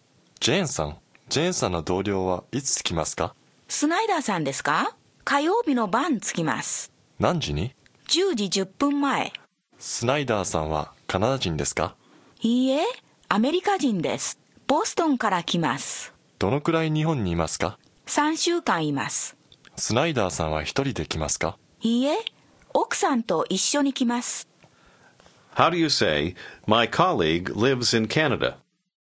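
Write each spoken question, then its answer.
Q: ジェーンさんの同僚はいつ着きますか?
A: 火曜日の晩(10時10分前)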